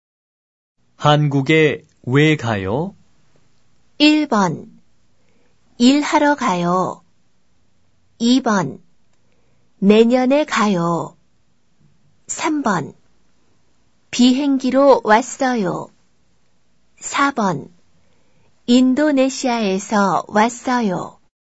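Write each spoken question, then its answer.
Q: 한국에 왜 가요?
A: 1: 일하러 가요.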